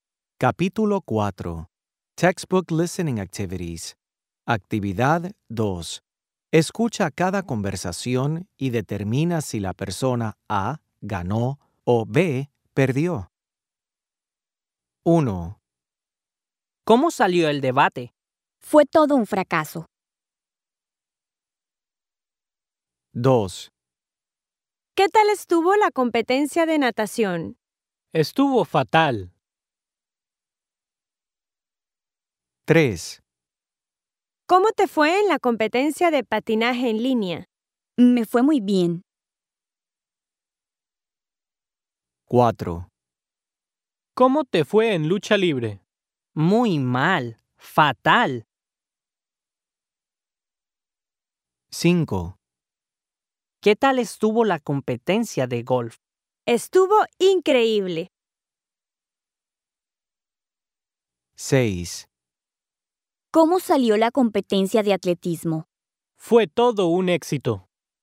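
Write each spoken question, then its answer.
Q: ¿Cómo salió el debate?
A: perdió

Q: ¿Qué tal estuvo la competencia de natación?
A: perdió

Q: ¿Cómo te fue en la competencia de patinaje en línea?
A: ganó

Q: ¿Cómo te fue en lucha libre?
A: perdió

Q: ¿Qué tal estuvo la competencia de golf?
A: ganó

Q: ¿Cómo salió la competencia de atletismo?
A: ganó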